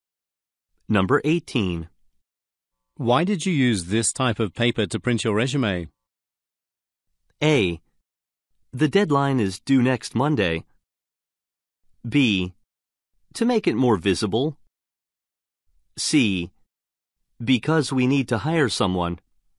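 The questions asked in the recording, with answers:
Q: Why did you use this type of paper to print your resume?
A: B: To make it more visible.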